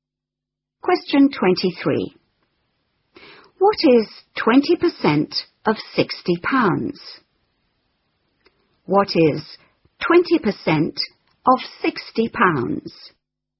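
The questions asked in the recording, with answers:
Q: What is 20% of 60 pounds?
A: £12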